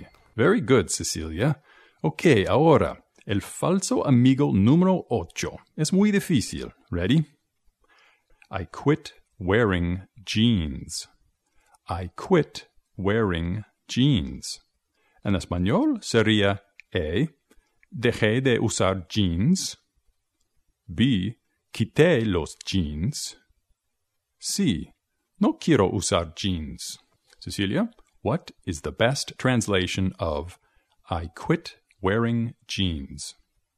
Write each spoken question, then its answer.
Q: Cecilia, what is the best translation of I quit Wearing jeans.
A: Así que yo creo que la respuesta correcta es A.